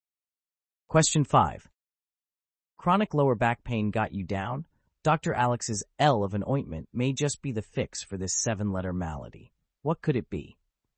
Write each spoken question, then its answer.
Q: Chronic lower back pain got you down? Dr. Alex's L of an ointment may just be the fix for this seven-letter malady. What could it be?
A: the answer is lumbago.